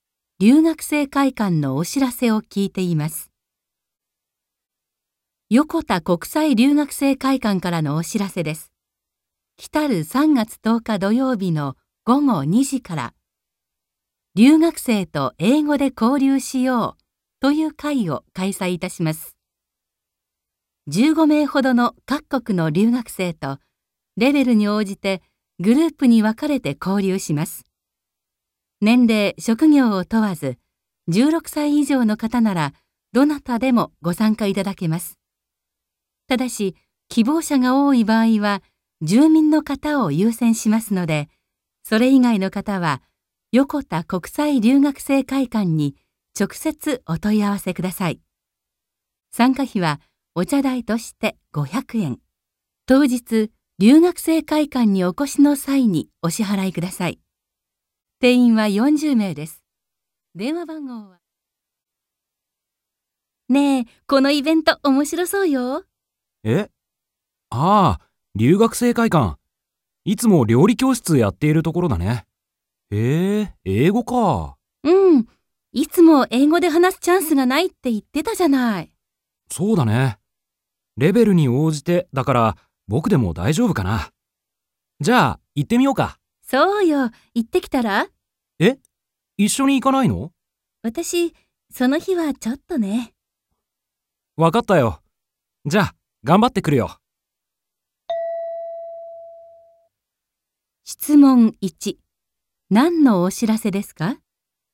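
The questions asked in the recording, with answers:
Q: 何のお知らせですか?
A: 留学生と英語で交流する会のお知らせ

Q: 二人はこの後どうしますか?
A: 男の人だけが交流会に参加する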